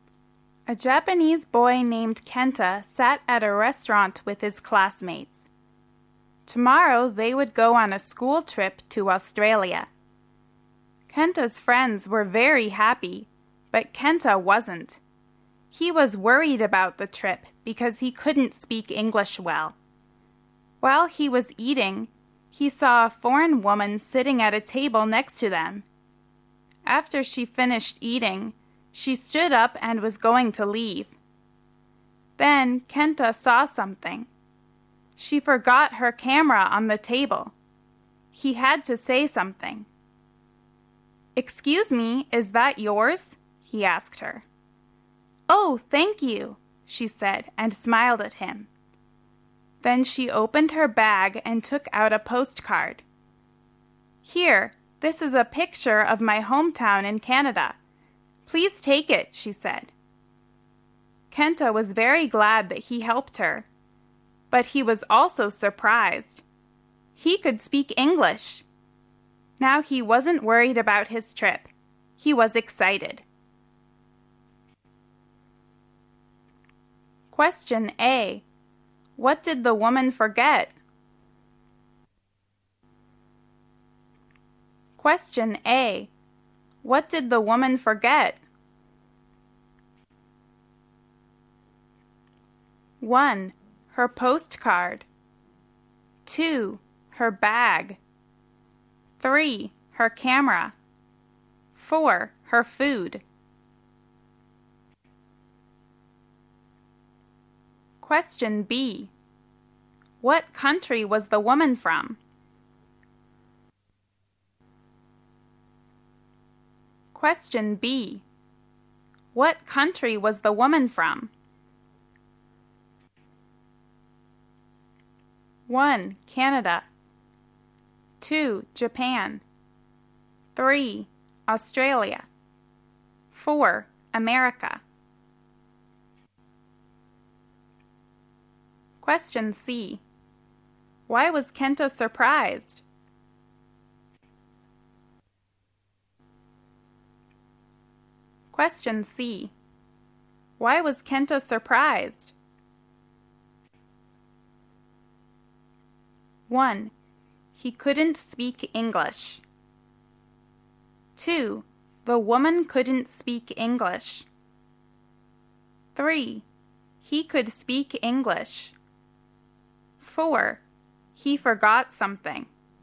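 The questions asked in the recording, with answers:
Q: What did the woman forget?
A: 3: Her camera.

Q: What country was the woman from?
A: 1: Canada.

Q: Why was Kenta surprised?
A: 3: He could speak English.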